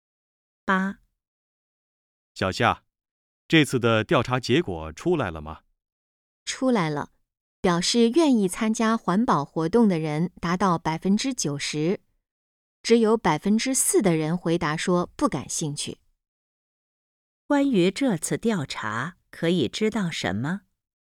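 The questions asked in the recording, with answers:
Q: 关于这次调查,可以知道什么?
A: 90%的人愿意参加环保活动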